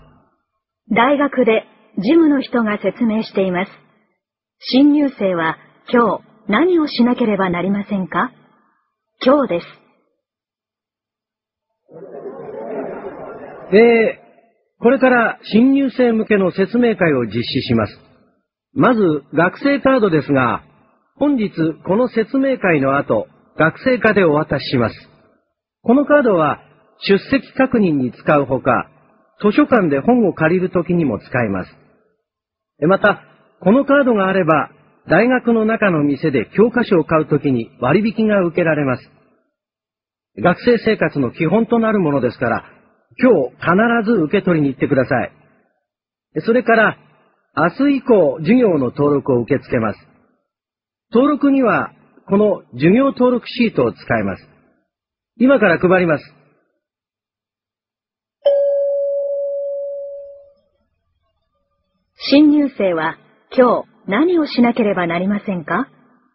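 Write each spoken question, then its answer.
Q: 新入生は今日何をしなければなりませんか?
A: 学生課で学生カードを受け取る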